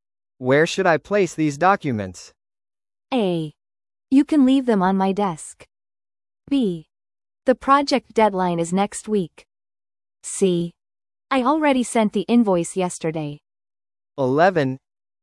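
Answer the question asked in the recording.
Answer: A: You can leave them on my desk.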